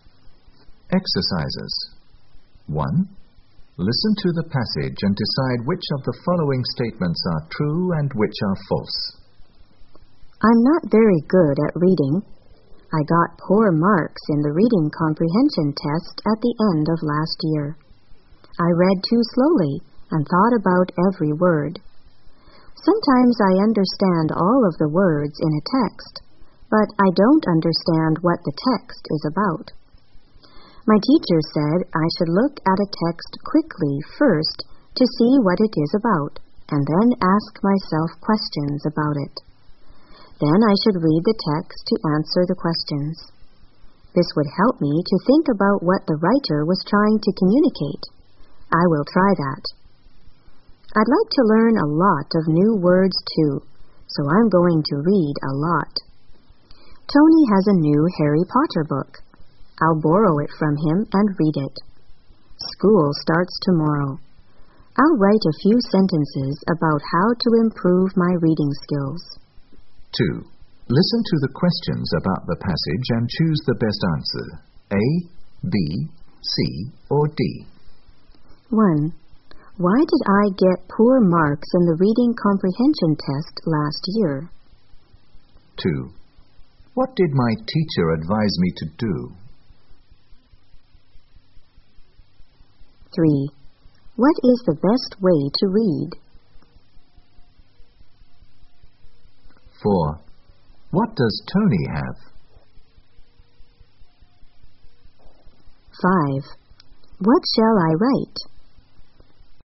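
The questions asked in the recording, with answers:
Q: Why did I get poor marks in the reading comprehension test last year?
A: Because I read too slowly and thought about every word.

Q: What did my teacher advise me to do?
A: Look at a text quickly first to see what it is about, then ask myself questions about it.

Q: What does Tony have?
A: A new Harry Potter book.

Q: What shall I write?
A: A few sentences about how to improve my reading skills.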